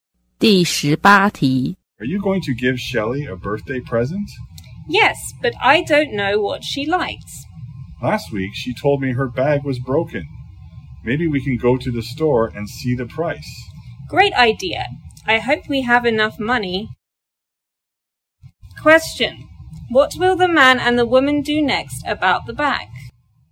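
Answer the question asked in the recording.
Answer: Go to the store and check the price.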